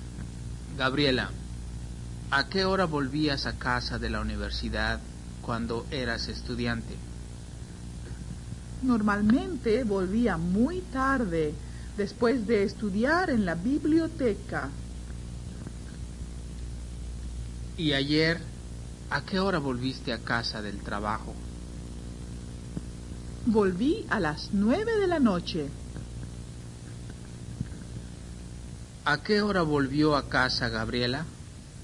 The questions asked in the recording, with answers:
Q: ¿A qué hora volvió a casa Gabriela?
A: Gabriela volvió a casa a las 9:00 p.m.